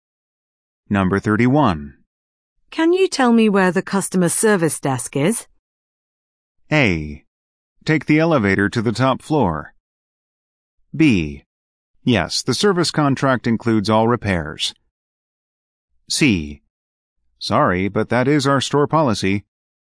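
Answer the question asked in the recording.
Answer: A: Take the elevator to the top floor.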